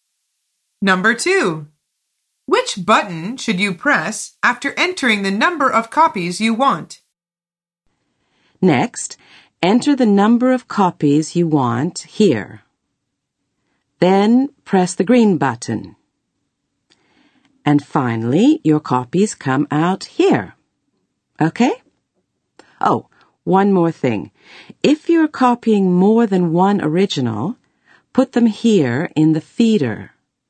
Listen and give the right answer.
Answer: The answer is the green button.